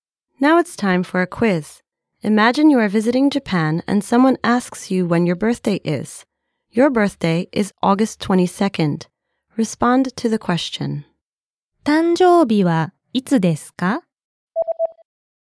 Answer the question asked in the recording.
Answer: 8月22日です。